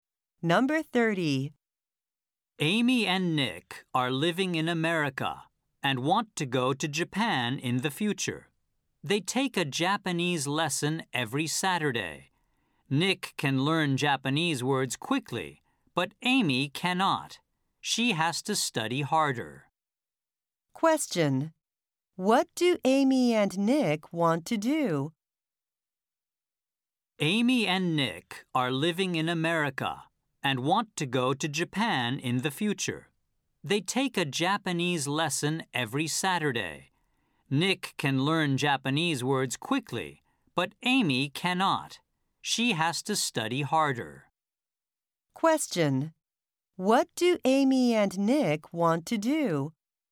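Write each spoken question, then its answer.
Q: What do Amy and Nick want to do?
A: Go to Japan in the future.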